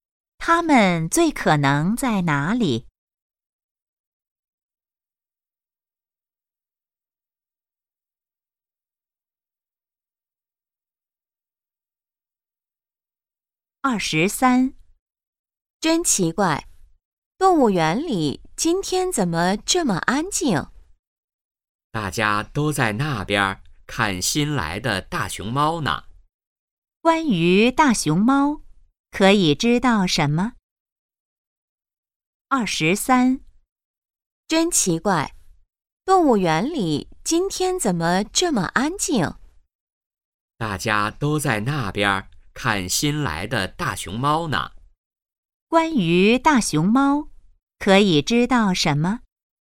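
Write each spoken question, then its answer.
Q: 关于大熊猫,可以知道什么?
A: 是新来的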